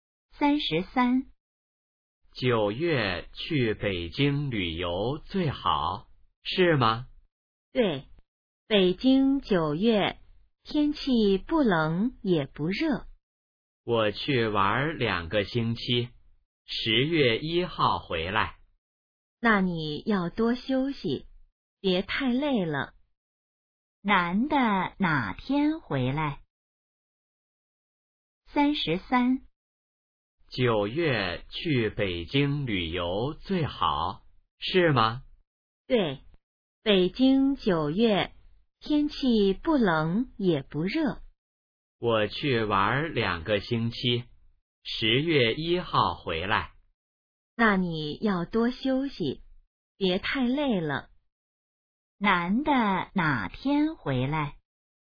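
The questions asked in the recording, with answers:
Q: 男的哪天回来?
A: 10月1号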